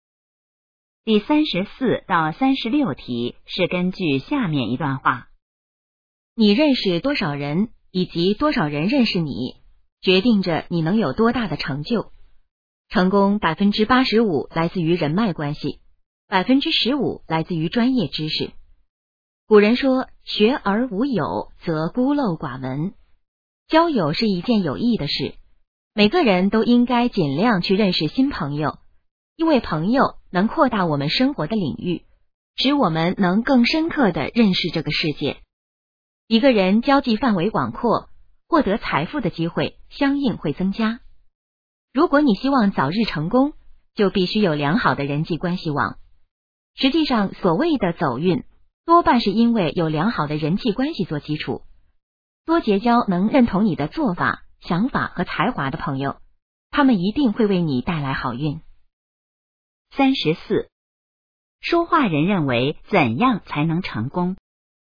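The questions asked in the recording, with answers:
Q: 说话人认为怎样才能成功?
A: 要有良好的人际关系网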